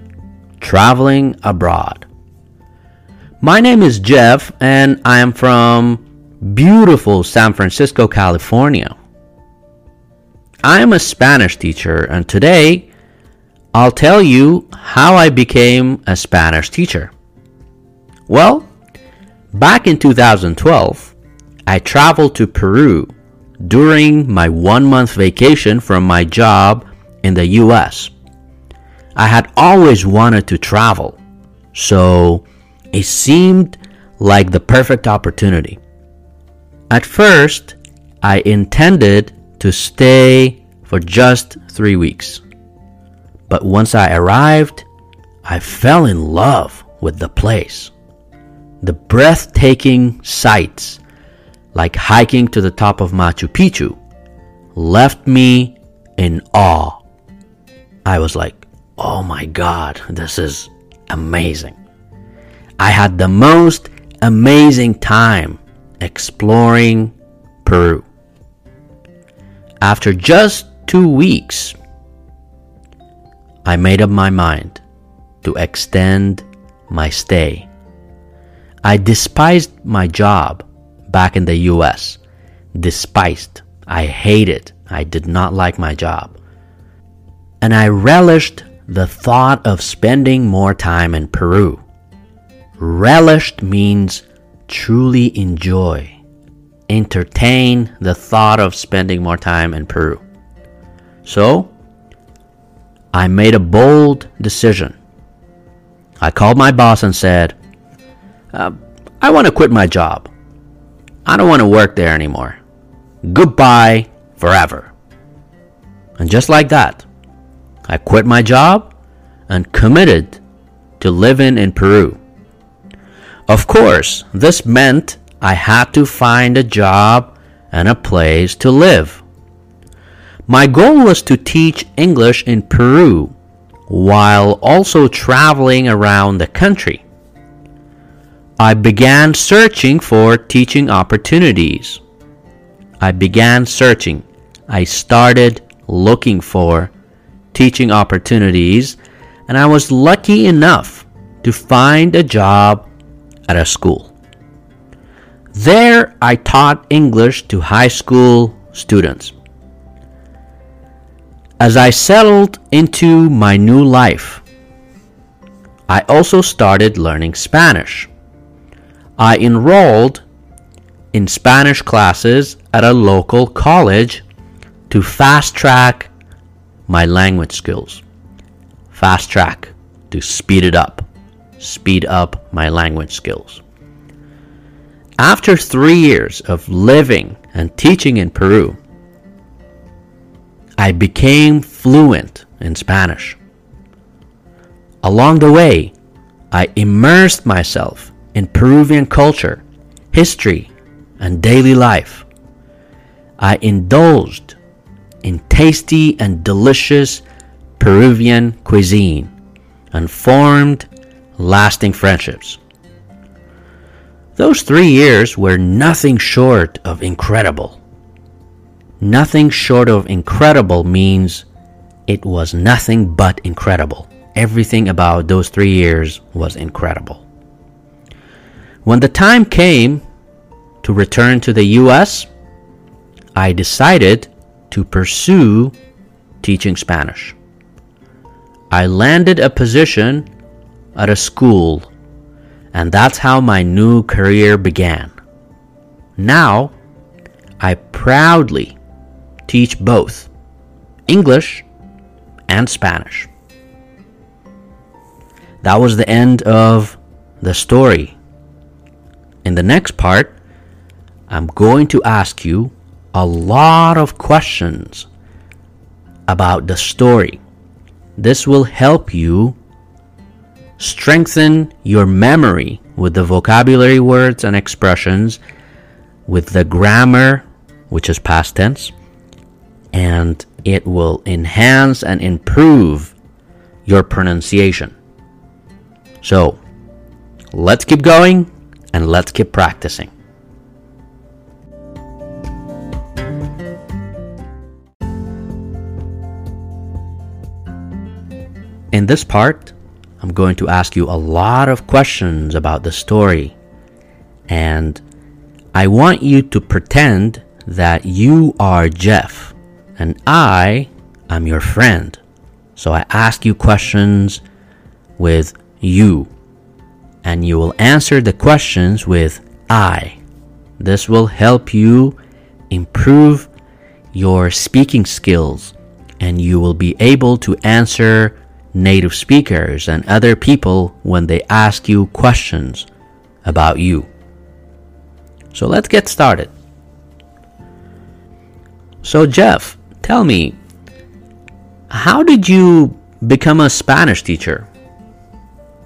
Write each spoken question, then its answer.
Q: So Jeff, tell me, how did you become a Spanish teacher?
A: Well, it's a long story, but actually I learned Spanish in Peru.